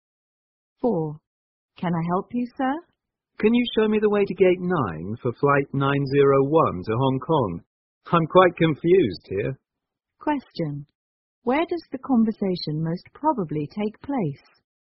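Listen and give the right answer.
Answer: At an airport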